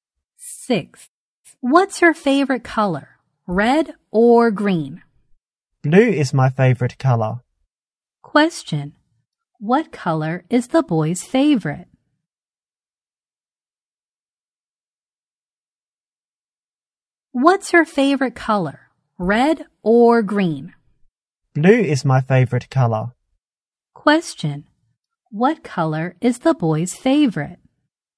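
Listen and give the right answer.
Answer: Blue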